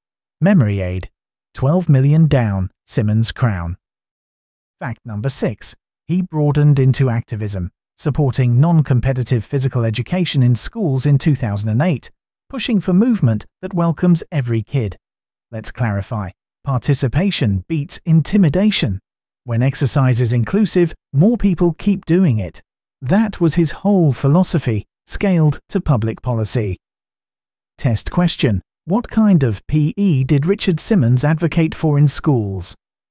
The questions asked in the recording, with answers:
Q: What kind of PE did Richard Simmons advocate for in schools?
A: Correct answer. Non-competitive PE.